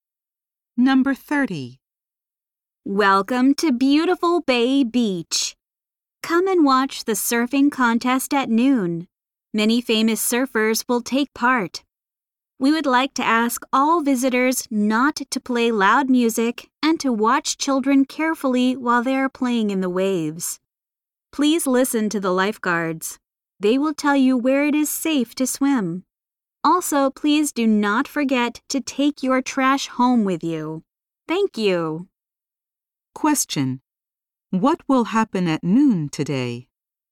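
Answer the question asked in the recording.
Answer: A surfing contest will be held.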